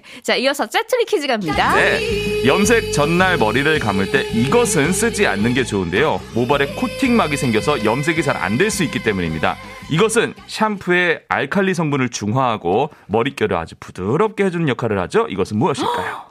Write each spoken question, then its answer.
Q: 이것은 무엇일까요?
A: 정답은 린스였습니다.